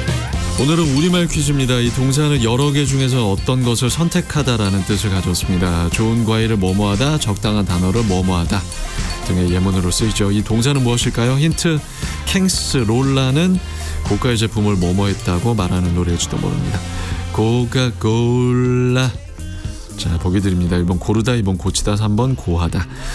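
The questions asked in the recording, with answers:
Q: 이 동사는 무엇일까요?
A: 1: 고르다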